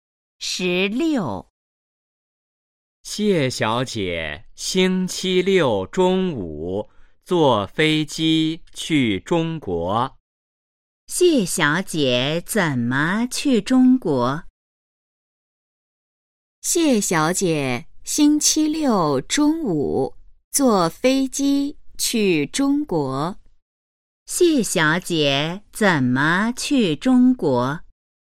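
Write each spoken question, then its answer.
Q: 谢小姐怎么去中国?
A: 坐飞机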